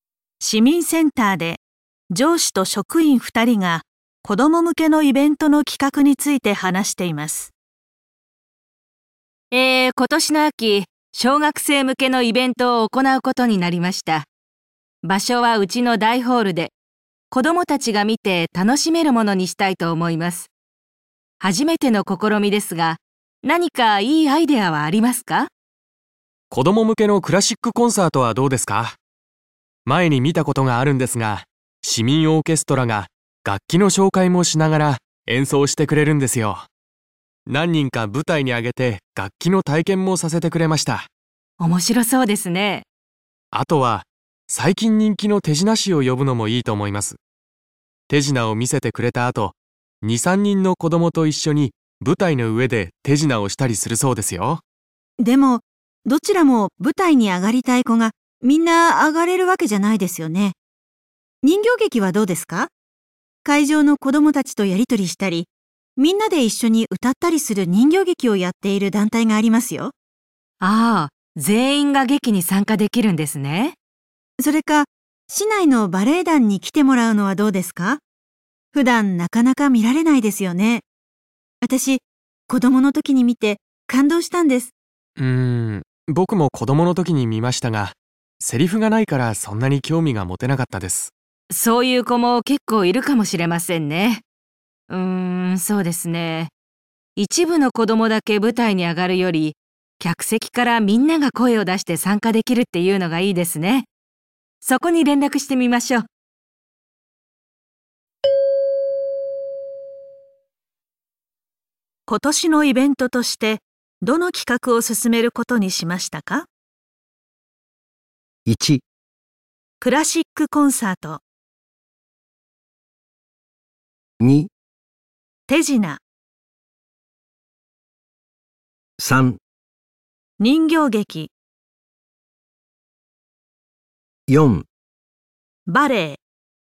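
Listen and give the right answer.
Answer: 3: 人形劇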